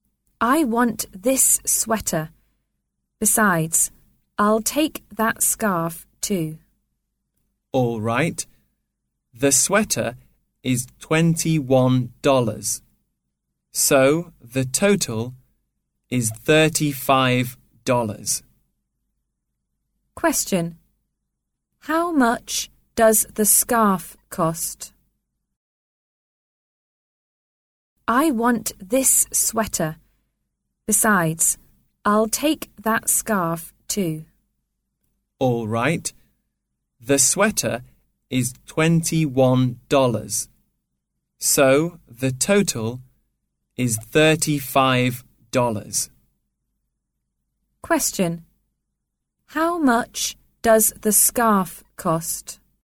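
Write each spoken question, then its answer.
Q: How much does the scarf cost?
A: $14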